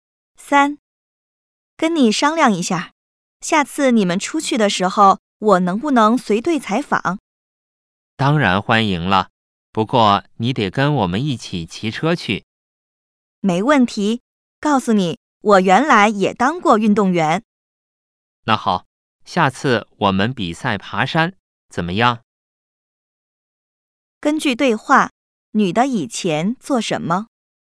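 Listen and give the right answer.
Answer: 运动员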